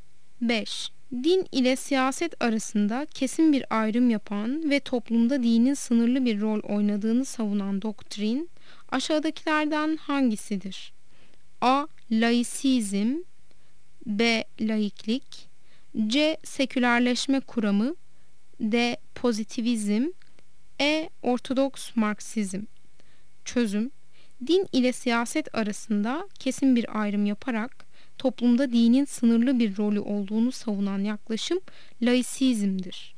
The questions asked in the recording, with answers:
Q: Din ile siyaset arasında kesin bir ayrım yapan ve toplumda dinin sınırlı bir rol oynadığını savunan doktrin aşağıdakilerden hangisidir?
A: Yanıt A'dır. Laisizm.